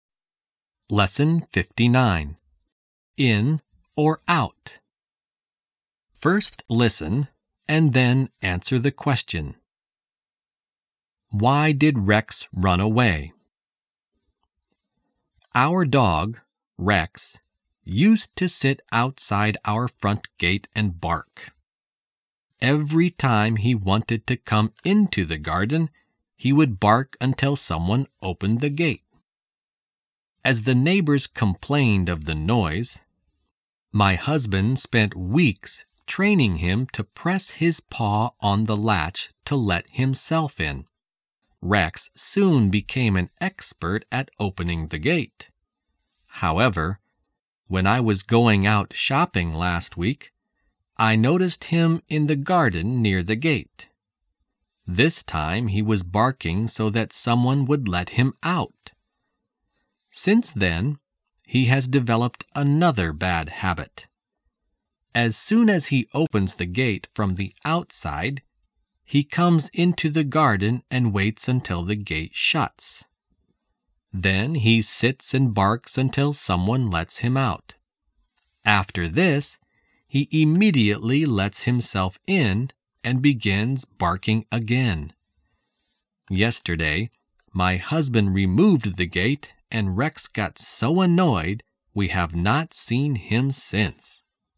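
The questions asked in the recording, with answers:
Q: Why did Rex run away?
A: Because the husband removed the gate and Rex got annoyed.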